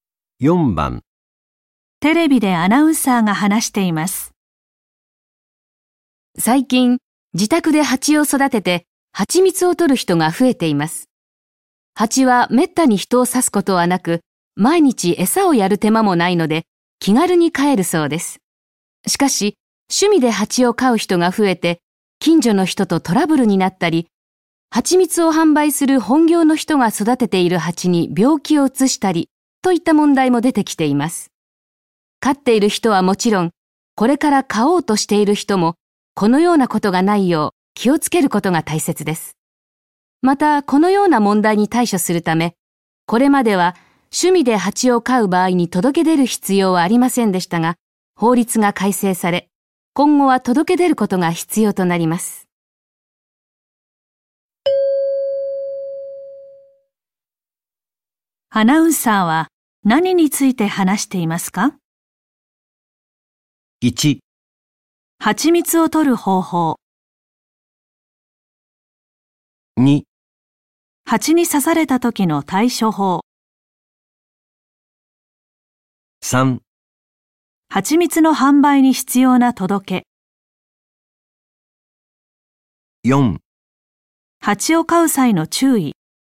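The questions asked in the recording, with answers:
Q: アナウンサーは何について話していますか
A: 4: 蜂を飼う際の注意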